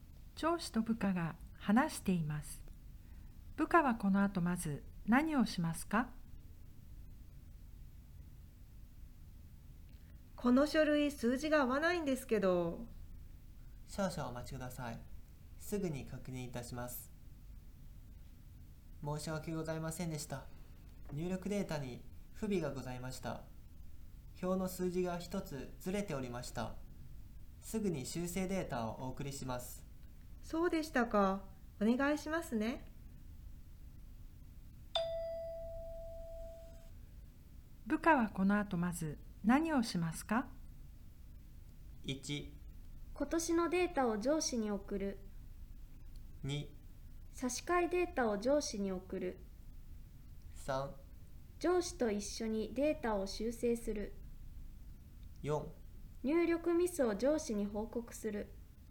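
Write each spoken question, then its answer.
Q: 部下はこの後まず何をしますか?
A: 2: 差し替えデータを上司に送る。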